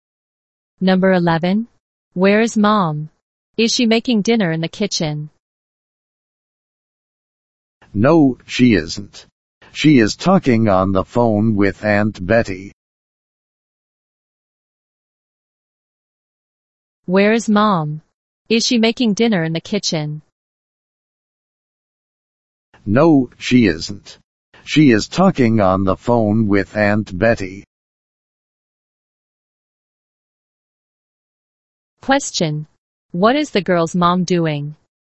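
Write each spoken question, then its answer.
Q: What is the girl's mom doing?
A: Talking on the phone with Aunt Betty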